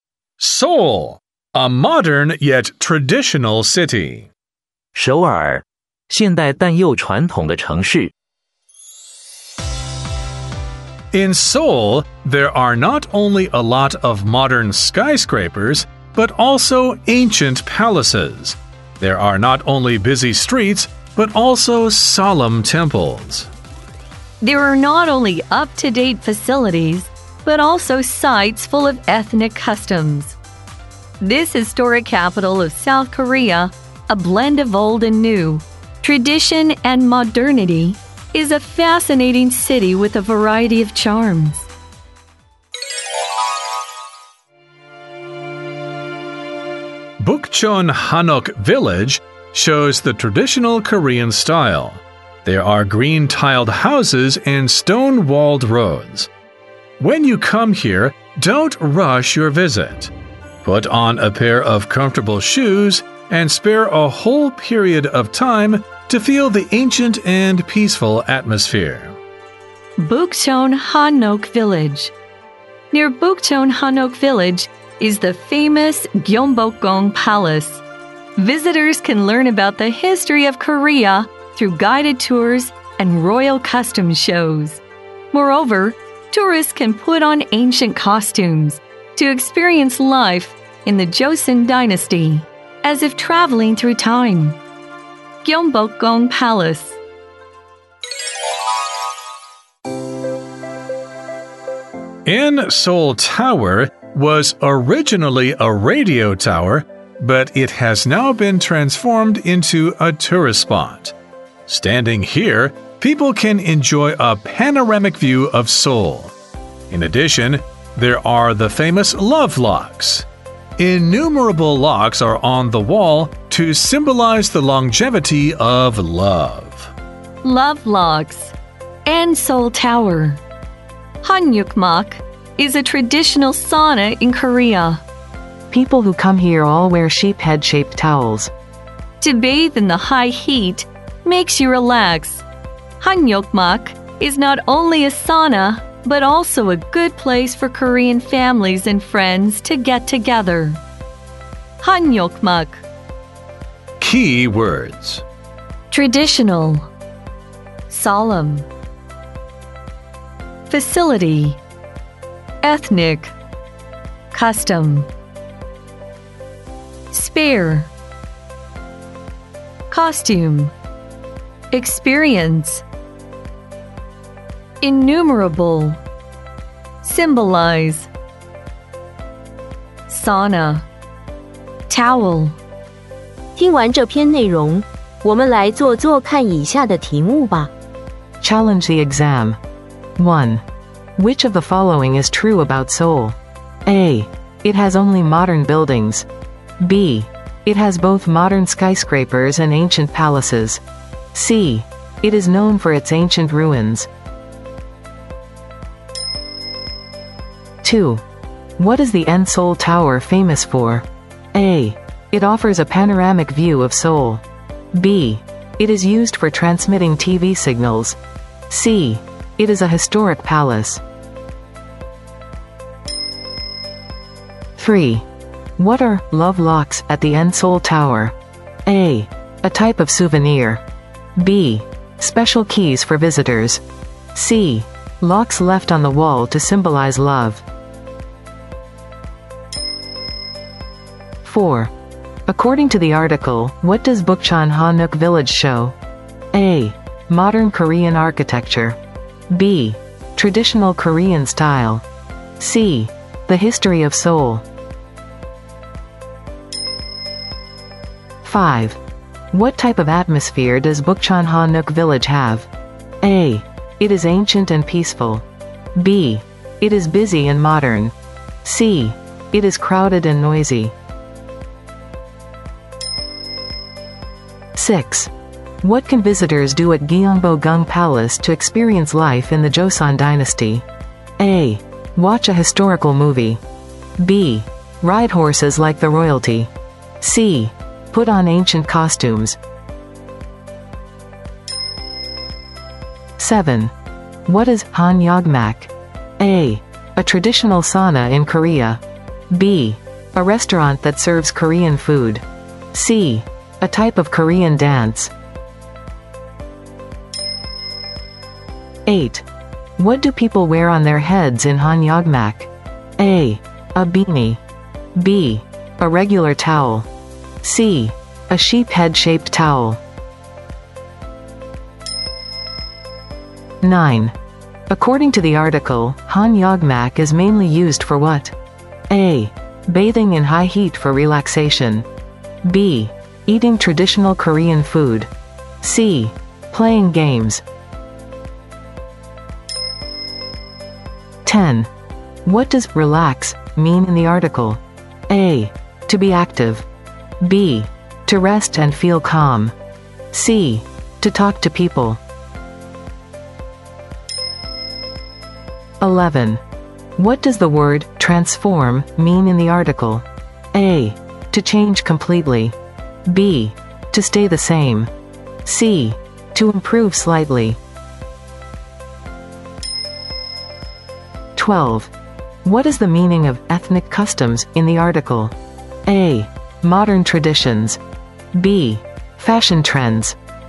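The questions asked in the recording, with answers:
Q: Which of the following is true about Seoul?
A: B: It has both modern skyscrapers and ancient palaces

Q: What is the Enseol Tower famous for?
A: A: It offers a panoramic view of Seoul

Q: What are love locks at the Enseol Tower?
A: C: Locks left on the wall to symbolize love

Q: According to the article, what does Bukcheon Hanok Village show?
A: B: Traditional Korean style

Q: What type of atmosphere does Bukchonhanuk village have?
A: A: It is ancient and peaceful

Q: What can visitors do at Gyeongbokgung Palace to experience life in the Joseon Dynasty?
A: C: Put on ancient costumes

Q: What is Hanyogmak?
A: A: A traditional sauna in Korea

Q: What do people wear on their heads in Hanyogmak?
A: C: A sheep head-shaped towel

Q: According to the article, Hanyogmak is mainly used for what?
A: A: Bathing in high heat for relaxation

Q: What does relax mean in the article?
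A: B: To rest and feel calm

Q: What does the word transform mean in the article?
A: A: To change completely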